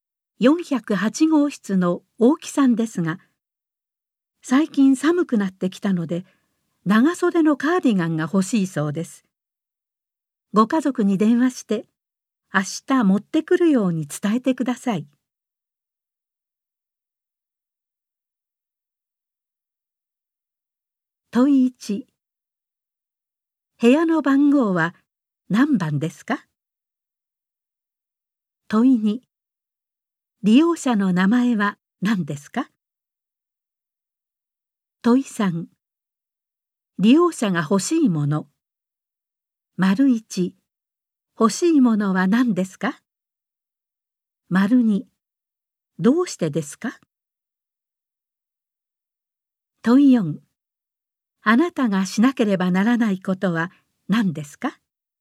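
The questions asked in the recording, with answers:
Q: 部屋の番号は何番ですか?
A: 10408号室

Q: 利用者の名前は何ですか?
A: 大木さん

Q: 欲しいものは何ですか?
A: 長袖のカーディガン

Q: どうしてですか?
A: 最近寒くなってきたから

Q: あなたがしなければならないことは何ですか?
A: 家族に電話して明日カーディガンを持ってくるように伝える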